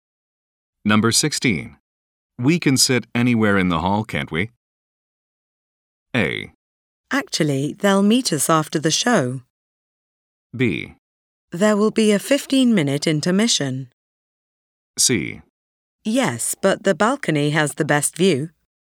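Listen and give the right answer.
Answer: C: Yes, but the balcony has the best view.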